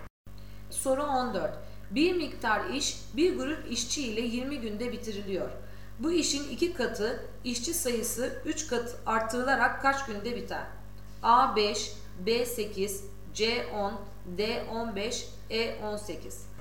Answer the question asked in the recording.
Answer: Doğru cevap C 10.